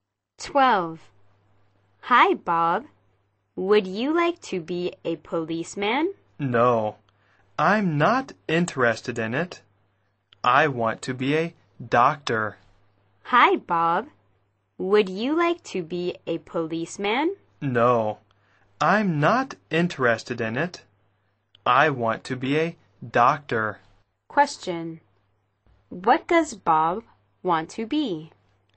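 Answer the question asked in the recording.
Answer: A doctor.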